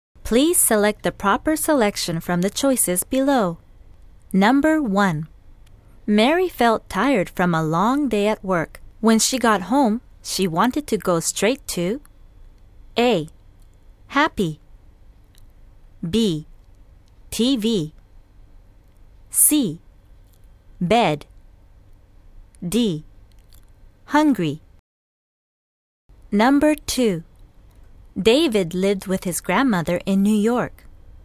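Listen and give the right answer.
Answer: C: Bed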